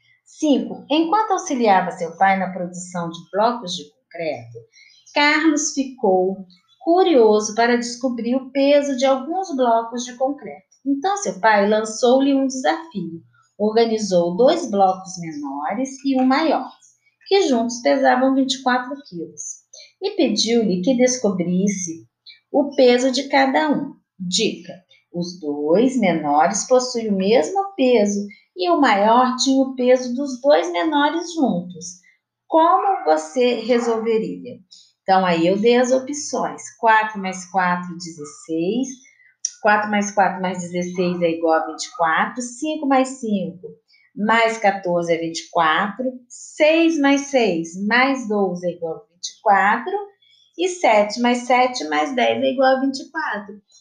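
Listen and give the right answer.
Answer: 6 mais 6 mais 12 é igual a 24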